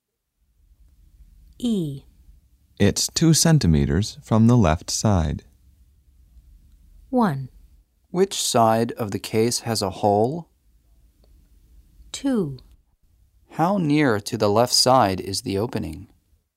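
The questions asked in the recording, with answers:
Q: It's 2 centimeters from the left side.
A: 2: How near to the left side is the opening?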